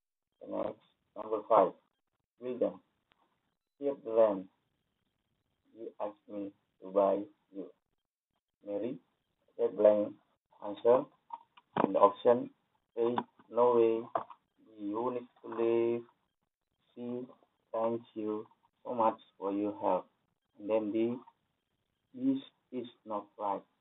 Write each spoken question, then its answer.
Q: William, here's the land. You asked me to buy you. Mary, that blank answer and option A way.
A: the correct answer is thank you so much for your help.